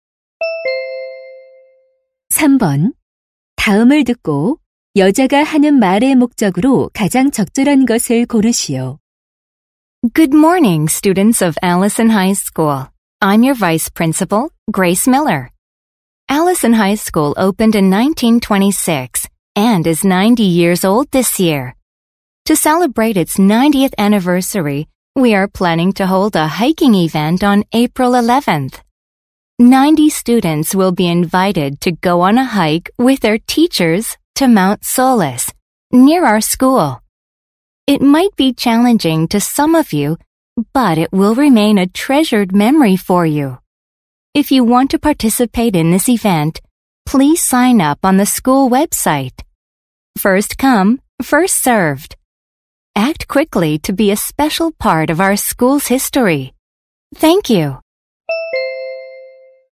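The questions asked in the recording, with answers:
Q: 다음을 듣고 여자가 하는 말의 목적으로 가장 적절한 것을 고르시오.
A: 개교 90주년 기념 등산 행사 참가 신청을 독려하려고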